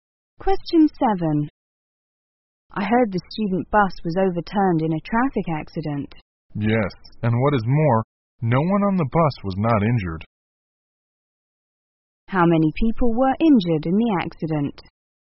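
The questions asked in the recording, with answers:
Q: How many people were injured in the accident?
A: Everyone on the bus.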